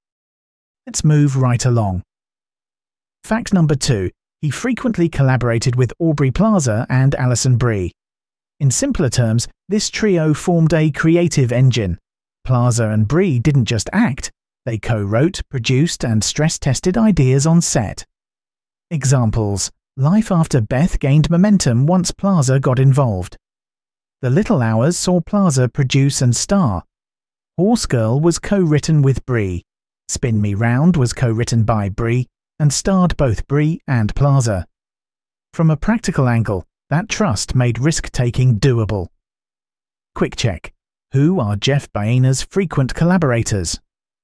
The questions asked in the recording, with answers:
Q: Who are Jeff Boehner's frequent collaborators?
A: Aubrey Plaza and Alison Brie.